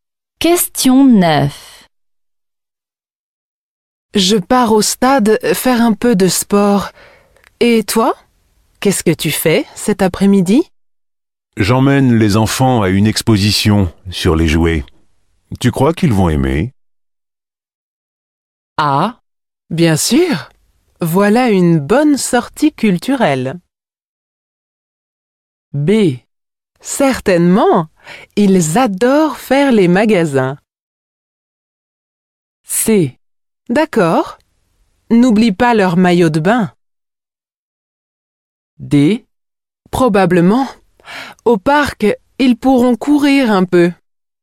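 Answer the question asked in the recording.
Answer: A: Bien sûr. Voilà une bonne sortie culturelle.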